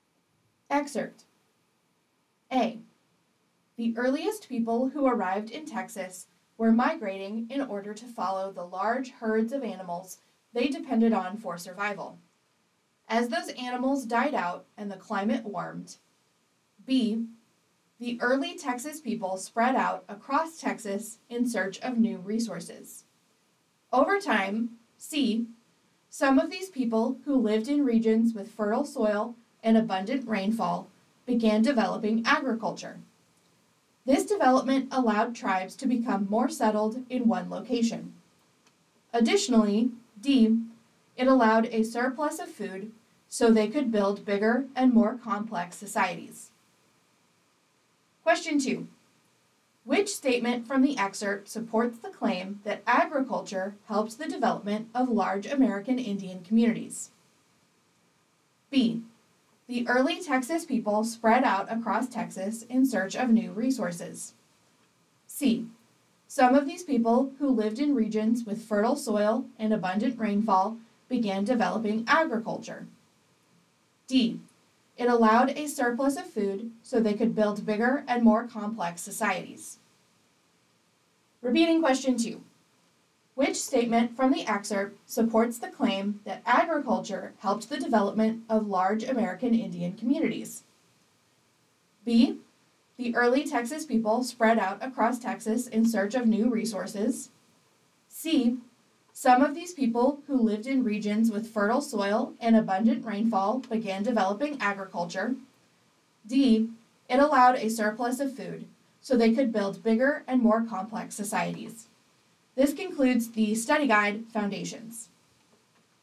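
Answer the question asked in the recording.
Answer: D: It allowed a surplus of food so they could build bigger and more complex societies.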